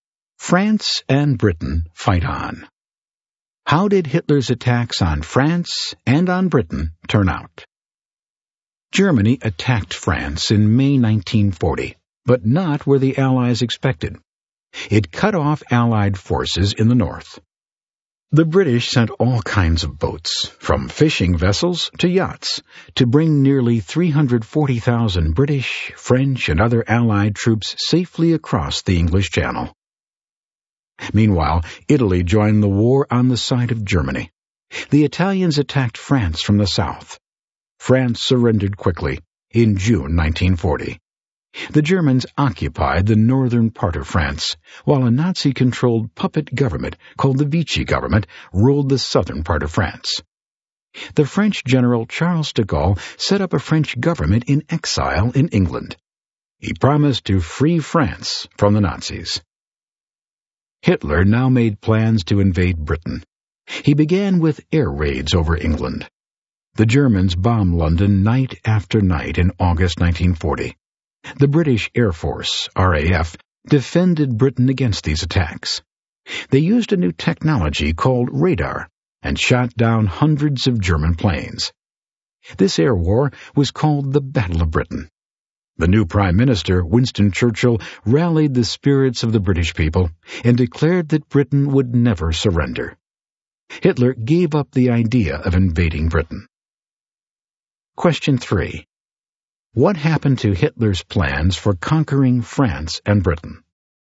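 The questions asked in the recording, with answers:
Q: What happened to Hitler's plans for conquering France and Britain?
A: France fell in June 1940, but he failed to defeat Britain in the Battle of Britain and gave up invading it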